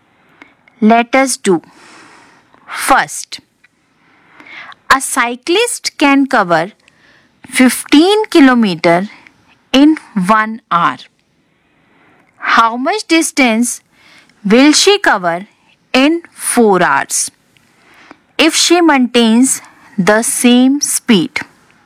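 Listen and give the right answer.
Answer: 60 km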